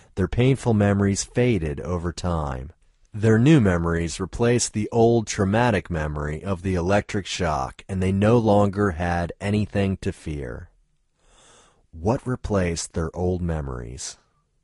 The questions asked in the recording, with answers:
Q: What replaced their old memories?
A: New memories replaced their old memories.